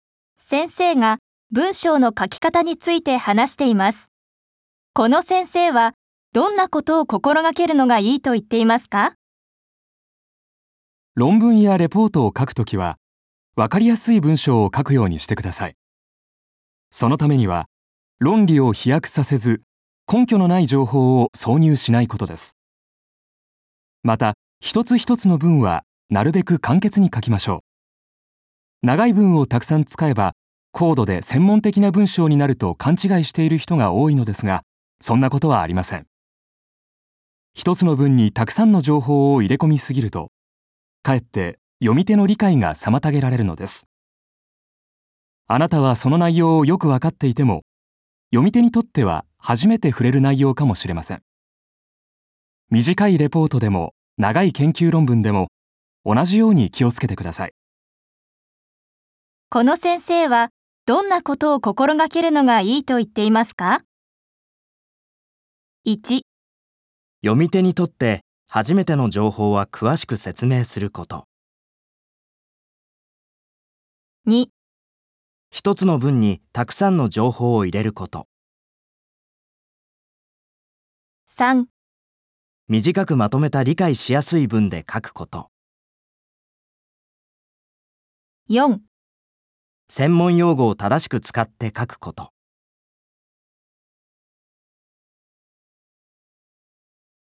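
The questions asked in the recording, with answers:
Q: この先生はどんなことを心がけるのがいいと言っていますか?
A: 3: 短くまとめた理解しやすい文で書くこと。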